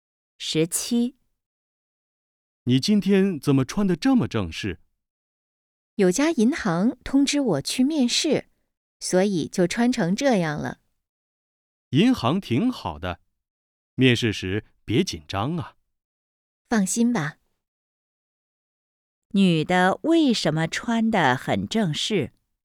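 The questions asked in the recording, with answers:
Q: 女的为什么穿得很正式?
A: 要去银行面试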